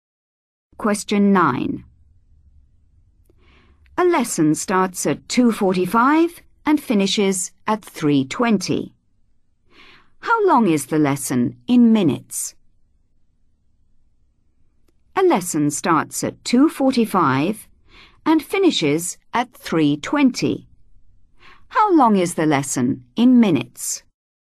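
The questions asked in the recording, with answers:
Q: How long is the lesson in minutes?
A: 35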